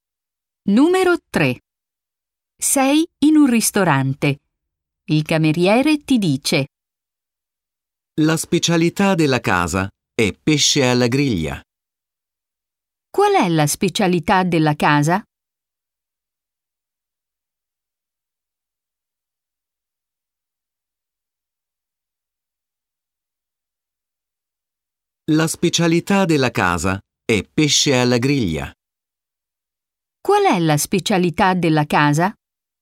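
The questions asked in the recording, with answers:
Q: Qual è la specialità della casa?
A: Pesce alla griglia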